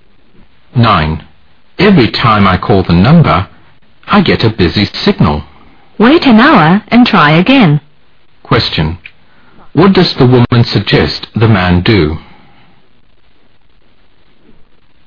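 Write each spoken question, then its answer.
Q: What does the woman suggest the man do?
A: Wait an hour and call again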